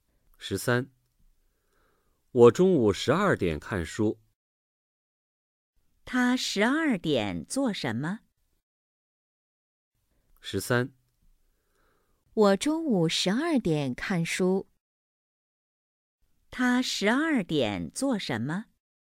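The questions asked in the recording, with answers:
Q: 他十二点做什么?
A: 看书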